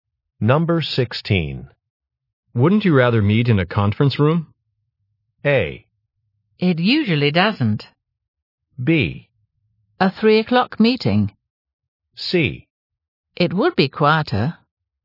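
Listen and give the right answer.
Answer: C: It would be quieter.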